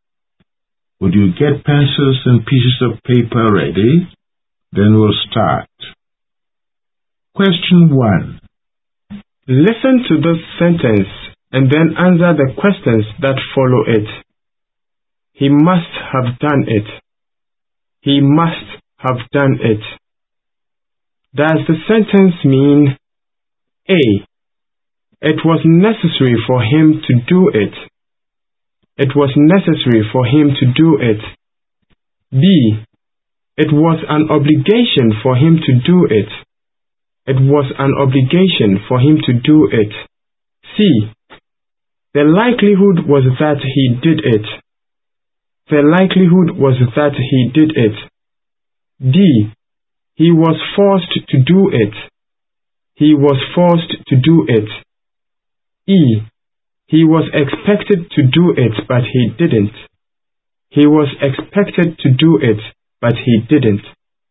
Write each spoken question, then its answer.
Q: Does the sentence mean A.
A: The sentence means, the likelihood was that he did it.